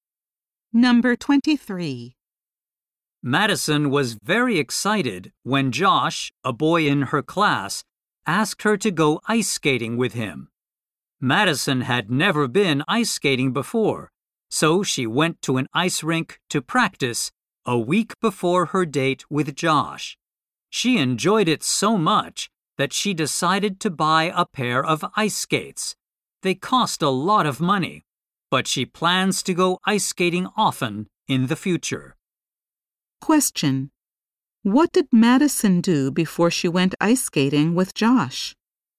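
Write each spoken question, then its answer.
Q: What did Madison do before she went ice skating with Josh?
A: She practiced ice skating at an ice rink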